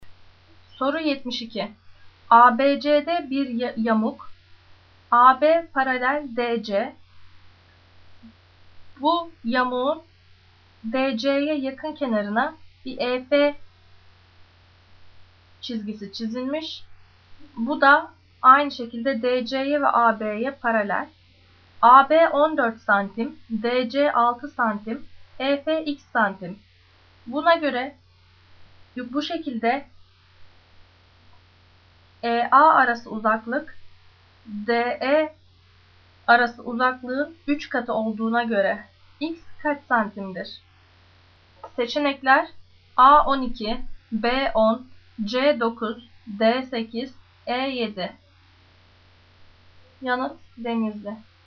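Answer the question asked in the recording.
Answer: D: 8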